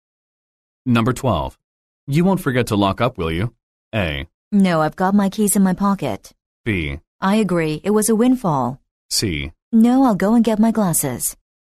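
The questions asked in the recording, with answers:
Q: You won't forget to lock up, will you?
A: A: No, I've got my keys in my pocket.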